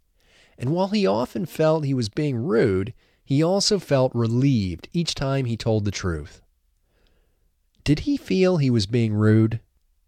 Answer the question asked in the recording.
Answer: Yes, he felt he was being rude.